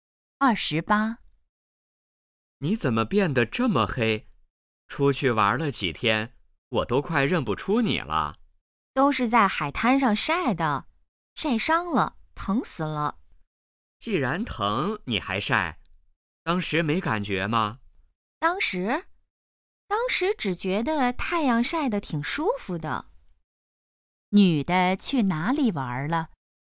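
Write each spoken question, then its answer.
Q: 女的去哪里玩了?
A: 海滩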